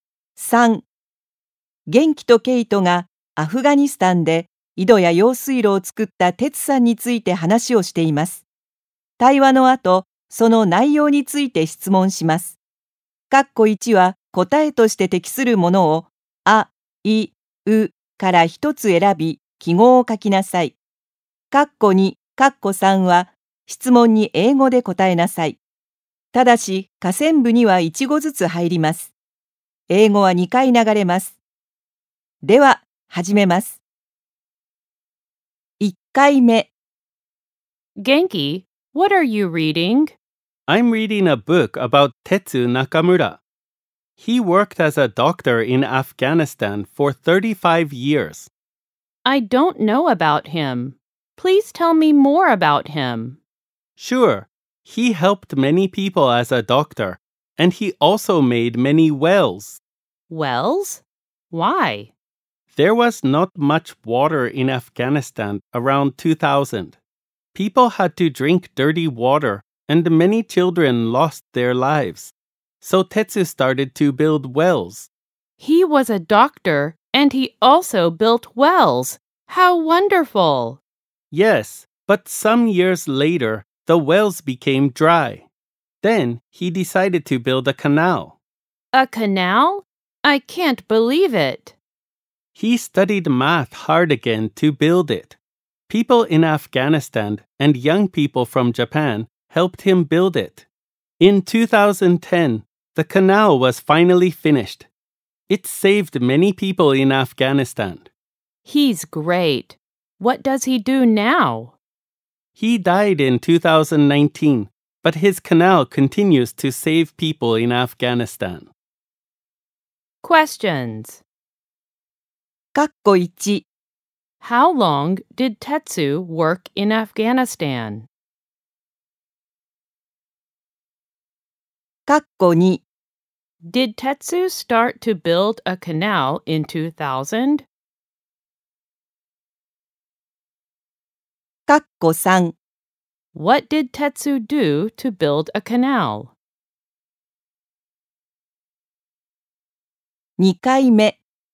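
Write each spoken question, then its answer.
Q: How long did Tetsu work in Afghanistan?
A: For 35 years.

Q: Did Tetsu start to build a canal in 2000?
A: No, he didn't.

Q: What did Tetsu do to build a canal?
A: He studied math hard again.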